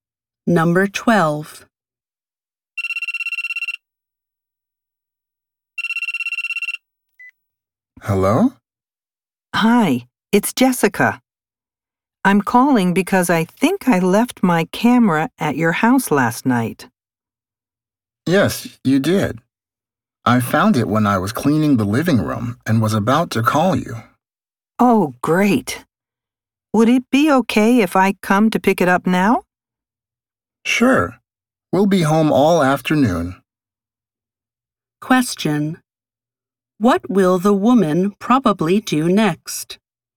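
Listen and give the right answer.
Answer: Go to the man's house to pick up her camera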